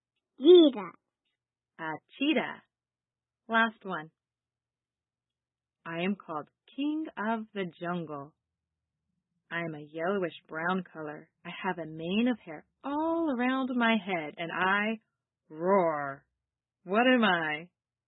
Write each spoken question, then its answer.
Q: What am I?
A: Lion.